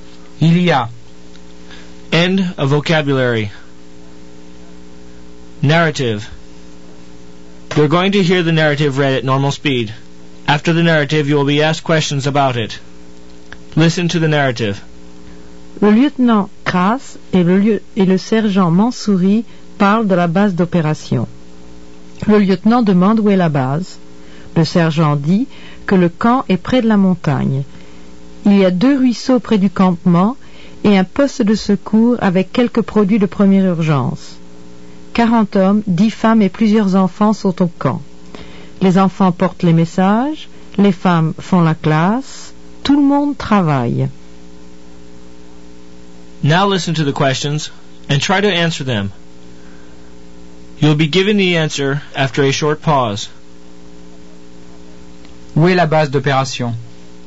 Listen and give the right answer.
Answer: La base est près de la montagne, or elle est près de la montagne.